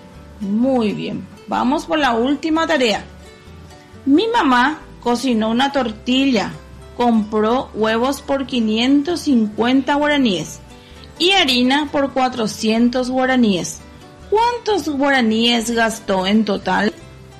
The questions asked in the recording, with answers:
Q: ¿Cuántos guaraníes gastó en total?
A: 950 guaraníes en total.